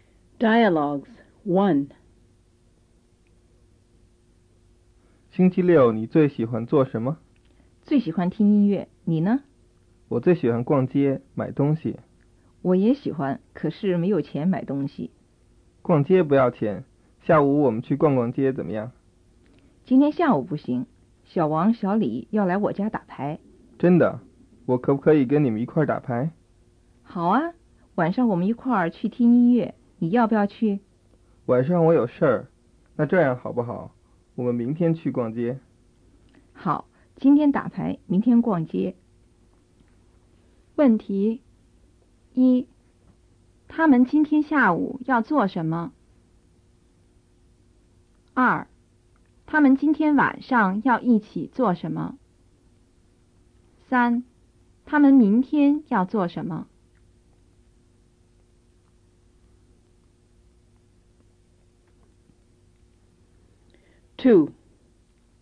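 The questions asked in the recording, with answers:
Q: 他们今天下午要做什么?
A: 打牌

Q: 他们明天要做什么?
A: 逛街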